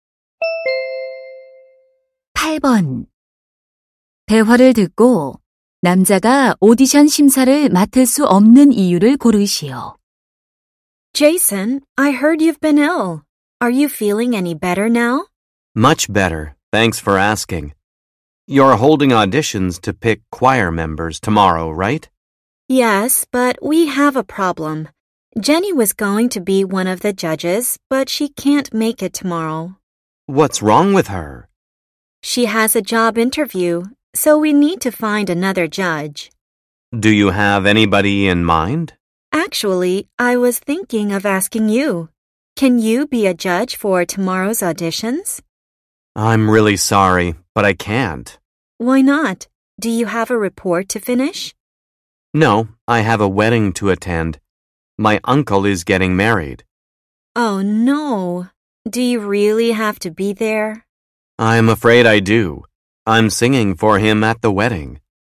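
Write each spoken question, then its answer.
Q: 대화를 듣고 남자가 오디션 심사를 맡을 수 없는 이유를 고르시오.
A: 삼촌의 결혼식에 참석해야 해서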